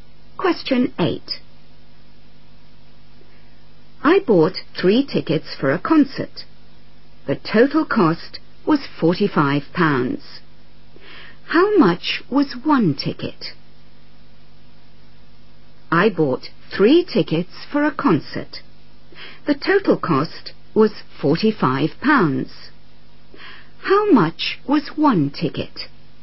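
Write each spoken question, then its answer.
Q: The total cost was £45. How much was 1 ticket?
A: £15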